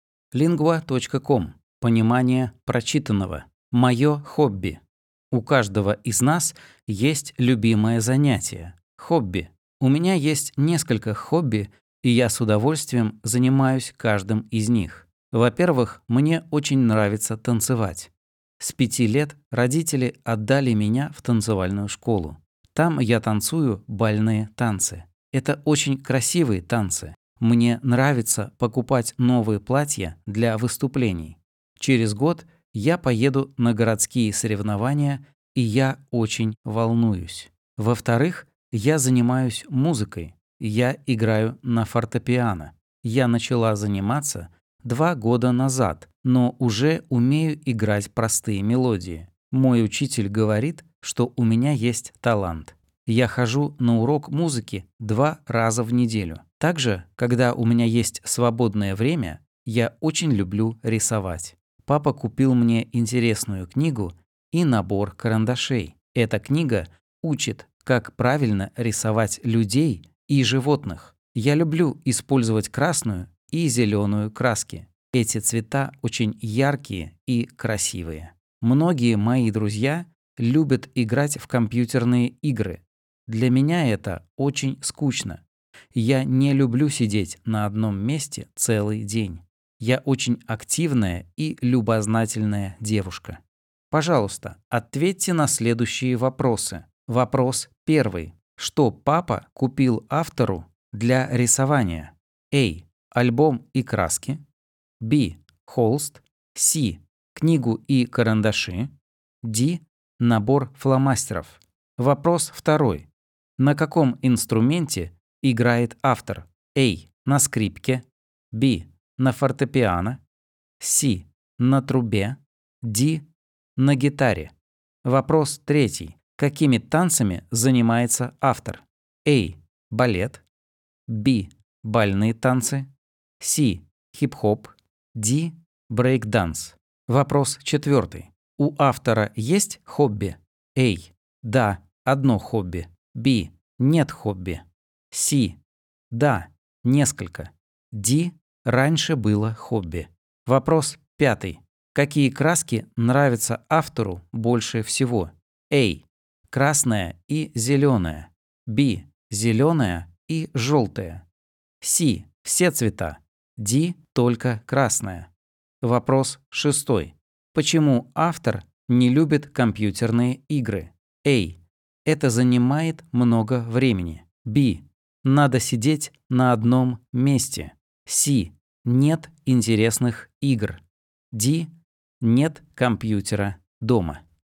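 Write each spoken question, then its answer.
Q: Что папа купил автору для рисования?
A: C: Книгу и карандаши.

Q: На каком инструменте играет автор?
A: B: На фортепиано.

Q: Какими танцами занимается автор?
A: B: Бальные танцы.

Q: У автора есть хобби?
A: C: Да, несколько.

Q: Какие краски нравятся автору больше всего?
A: A: Красная и зеленая.

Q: Почему автор не любит компьютерные игры?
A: B: Надо сидеть на одном месте.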